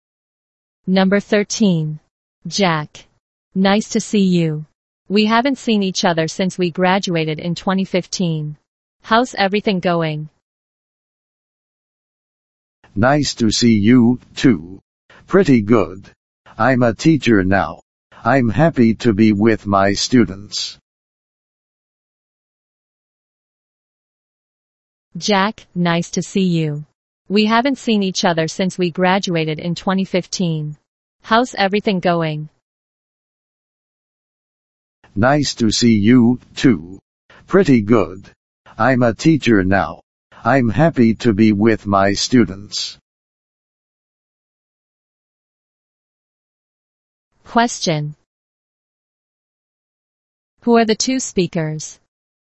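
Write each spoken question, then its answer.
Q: Who are the two speakers?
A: Old classmates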